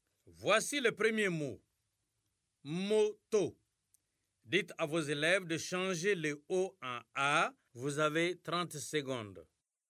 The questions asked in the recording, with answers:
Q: Voici le premier mot. Moto. Dites à vos élèves de changer le O en A.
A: Monsieur, c'est Mata.